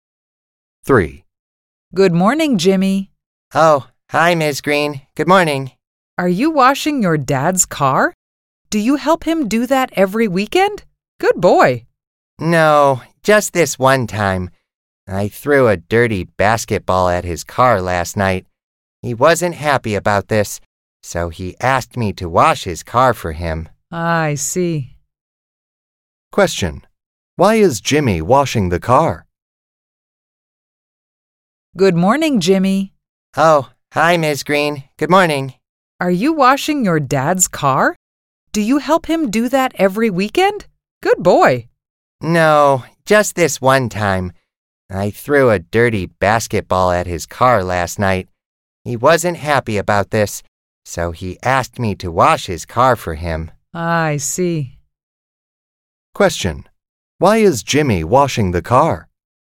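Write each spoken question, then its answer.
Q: Why is Jimmy washing the car?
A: He threw a dirty basketball at his dad's car, so his dad asked him to wash it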